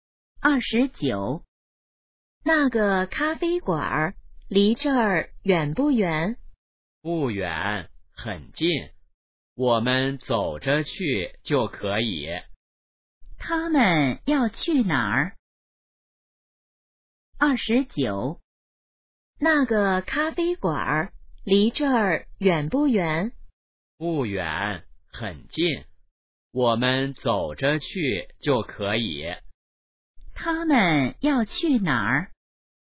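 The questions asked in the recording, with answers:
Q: 他们要去哪儿?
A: 咖啡馆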